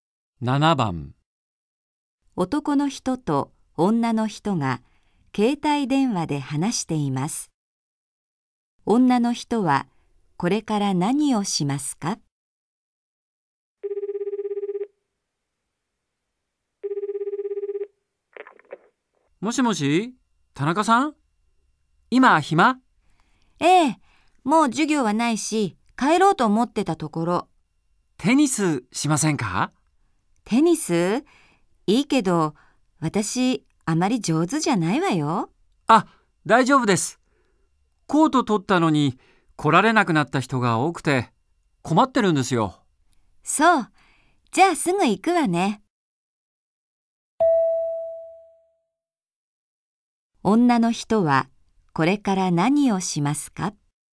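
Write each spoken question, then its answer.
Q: 女の人はこれから何をしますか?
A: テニスをしに行く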